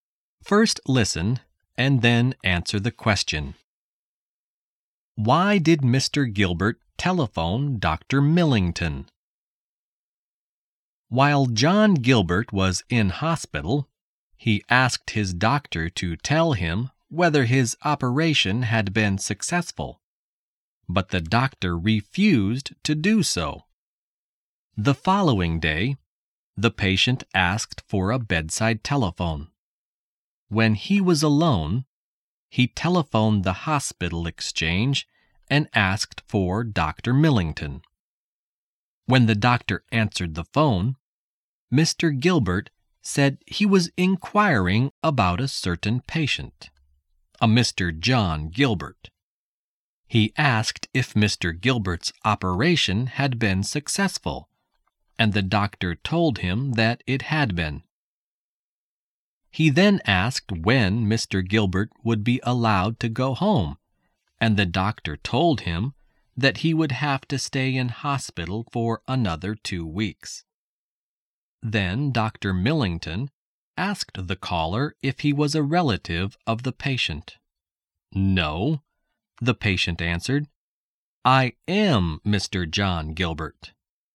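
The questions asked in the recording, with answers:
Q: Why did Mr. Gilbert telephone Dr. Millington?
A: To find out whether his operation had been successful, since the doctor had refused to tell him.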